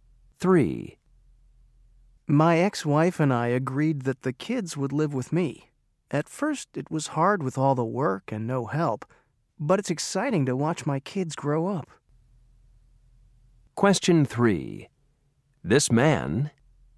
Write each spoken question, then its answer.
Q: This man...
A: And fortunately, there are organizations to help divorced fathers like me.